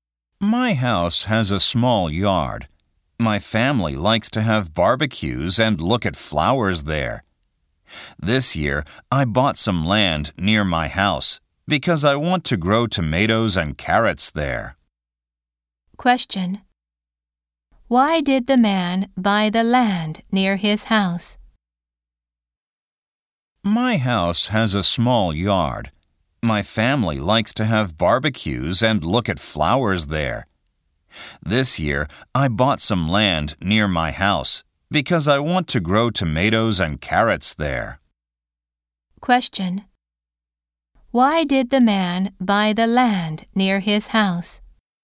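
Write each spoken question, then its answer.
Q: Why did the man buy the land near his house?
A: To grow tomatoes and carrots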